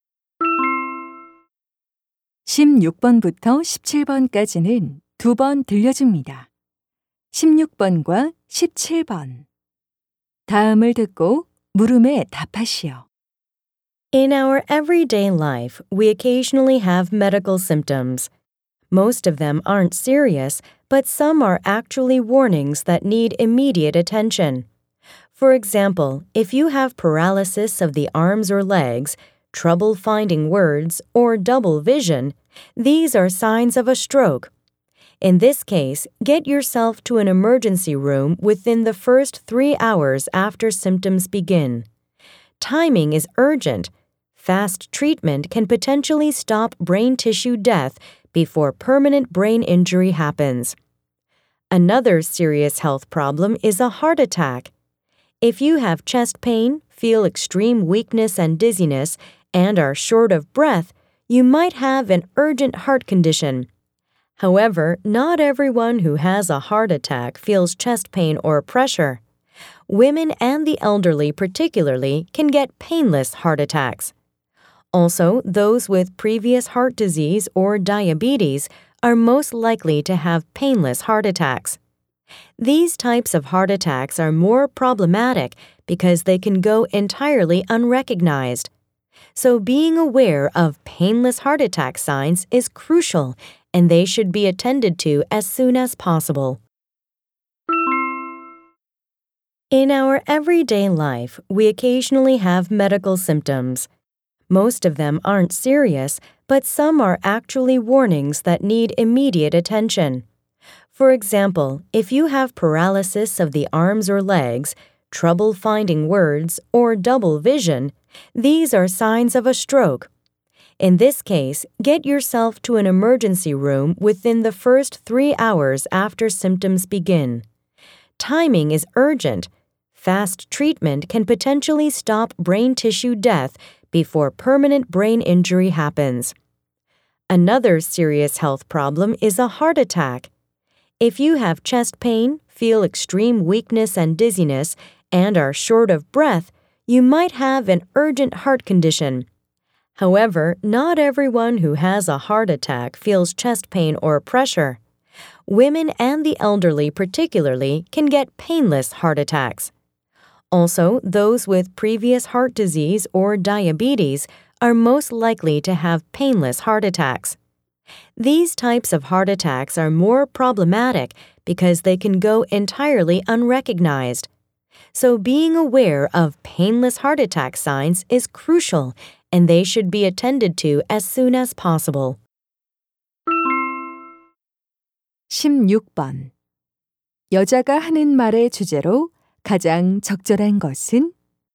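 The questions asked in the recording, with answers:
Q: 여자가 하는 말의 주제로 가장 적절한 것은?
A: 즉시 치료가 필요한 위험한 증상들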